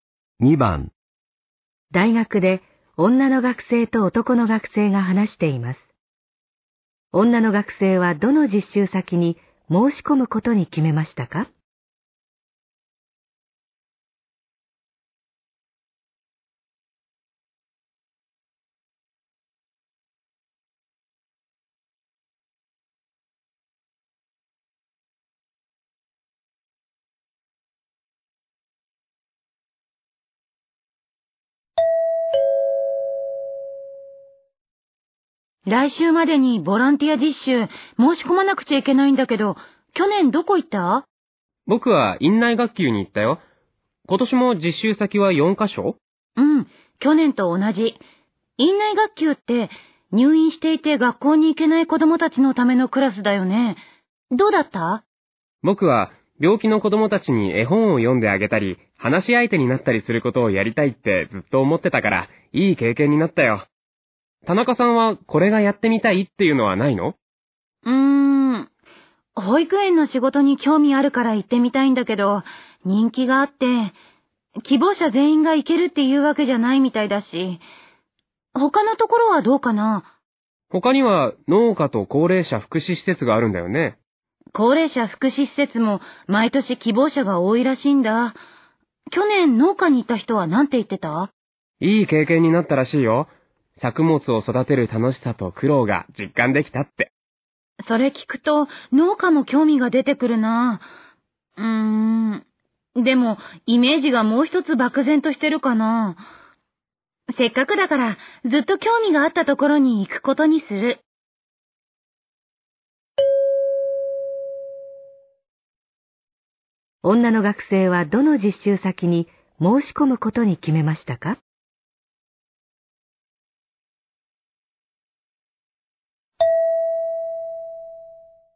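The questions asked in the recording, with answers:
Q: 女の学生はどの実習先に申し込むことに決めましたか?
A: 保育園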